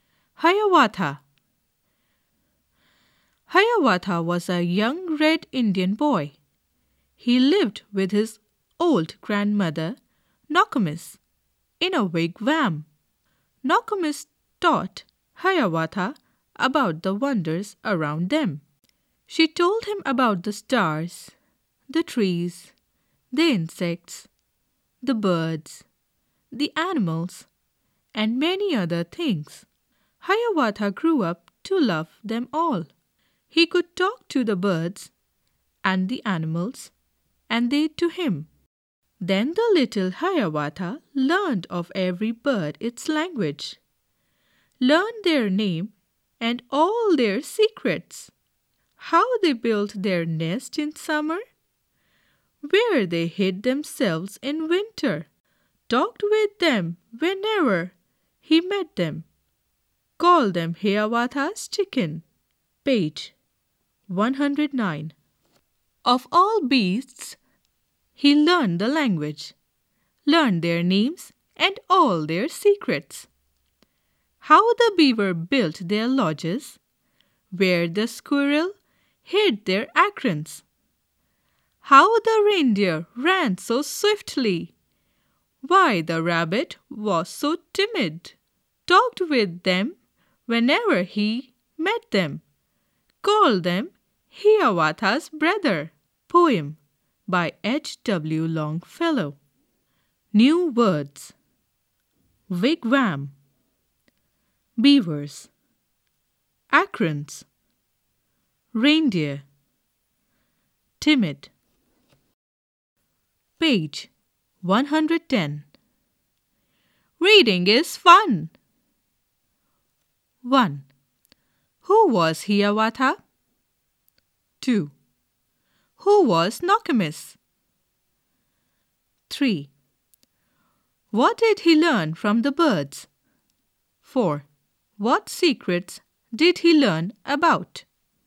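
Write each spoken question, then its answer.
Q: Who was Hiawatha?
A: A young red Indian boy

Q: Who was Nokomis?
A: Hiawatha's old grandmother

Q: What did he learn from the birds?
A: Their language, their names and all their secrets

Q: What secrets did he learn about?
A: How birds built their nests in summer and where they hid in winter; how beavers built their lodges, where squirrels hid their acorns, how reindeer ran so fast, why rabbits were so timid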